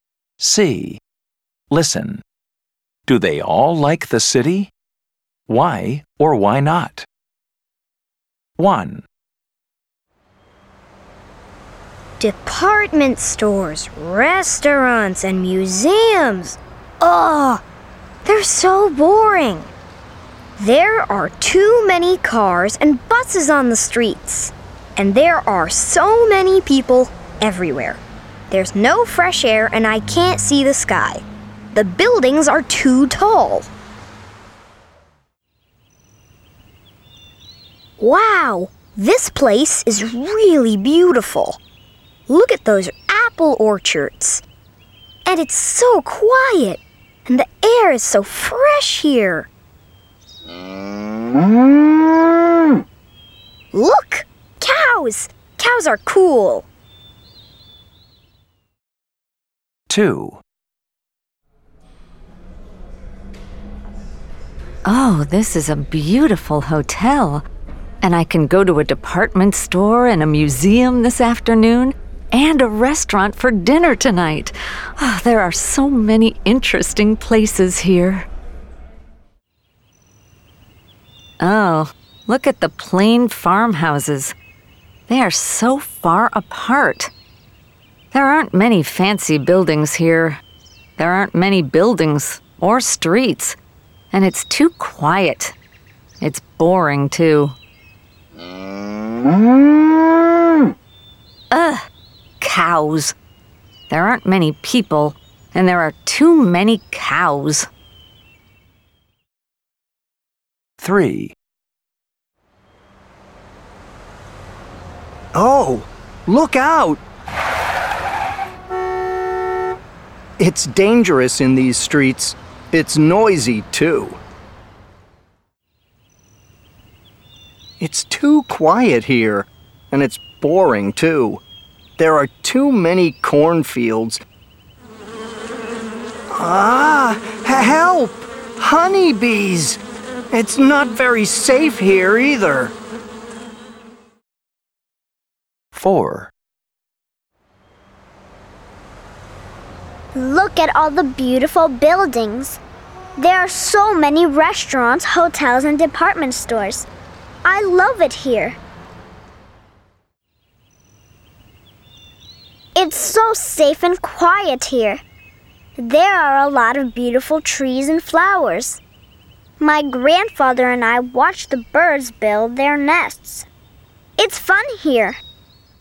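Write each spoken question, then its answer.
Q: Do they all like the city?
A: No. Speakers 1 and 3 don't like the city: it's boring, crowded, noisy and dangerous. Speakers 2 and 4 like it: it has many interesting places, restaurants, hotels and department stores.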